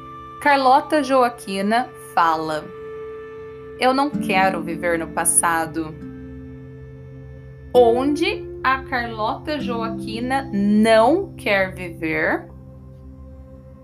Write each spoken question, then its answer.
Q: a Carlota Joaquina não quer viver?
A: No passado. A Carlota Joaquina não quer viver no passado.